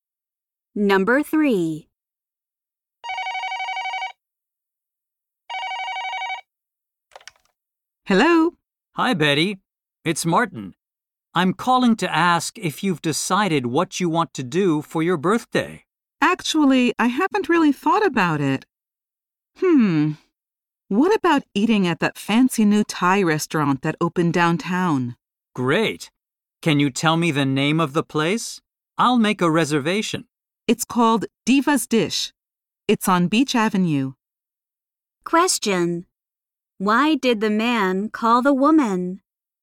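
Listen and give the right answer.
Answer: To ask what she wants to do for her birthday.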